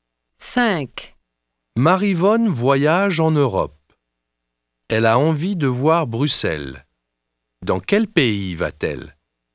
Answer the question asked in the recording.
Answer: Elle va en Belgique.